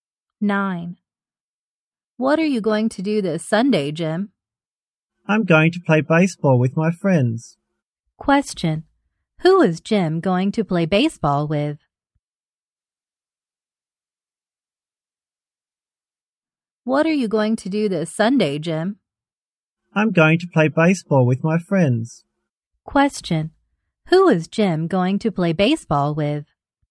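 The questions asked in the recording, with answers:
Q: Question, who is Jim going to play baseball with?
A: His friends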